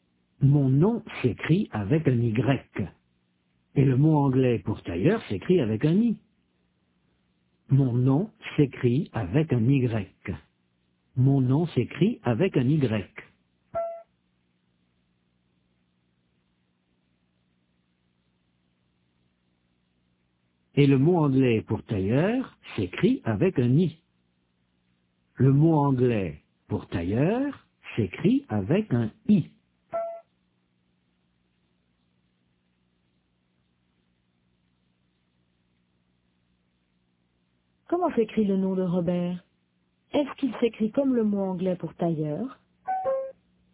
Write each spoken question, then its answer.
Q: Est-ce qu'il s'écrit comme le mot anglais pour tailleur?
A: Non, il s'écrit avec un Y.